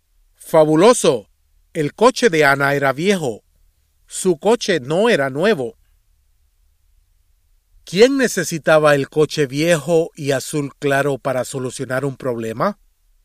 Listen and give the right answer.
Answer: Anna necesitaba el coche viejo y azul claro para solucionar su problema.